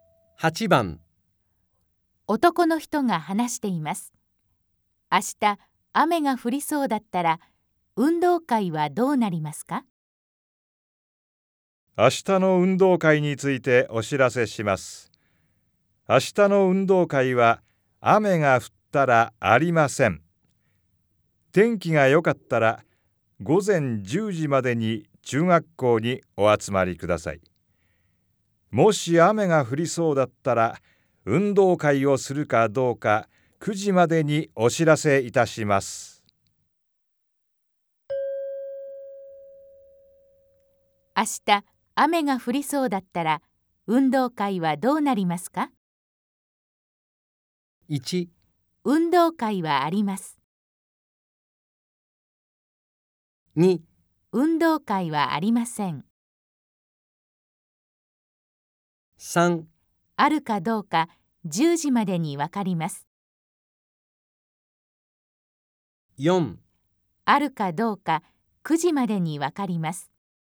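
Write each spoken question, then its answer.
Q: 明日、雨が降りそうだったら、運動会はどうなりますか?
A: 4: あるかどうか9時までに分かります。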